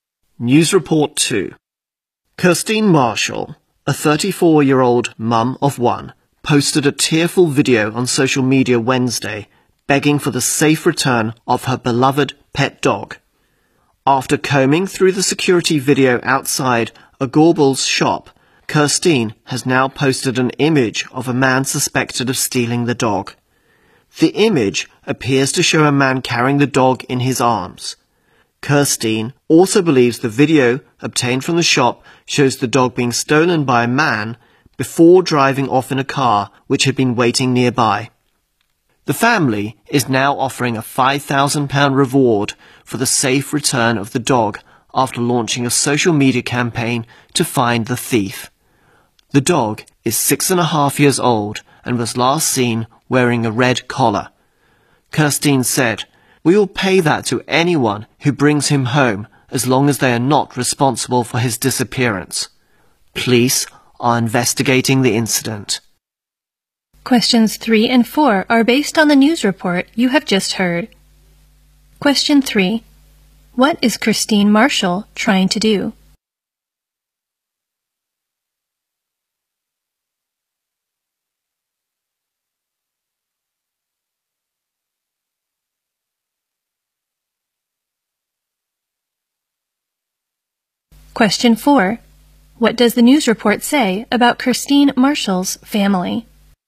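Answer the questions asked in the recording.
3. Get her stolen pet dog back
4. They are offering a £5,000 reward for the dog's safe return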